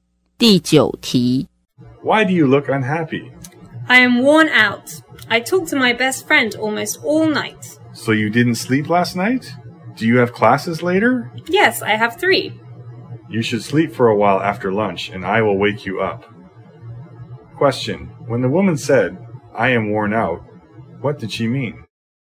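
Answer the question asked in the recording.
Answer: She was very tired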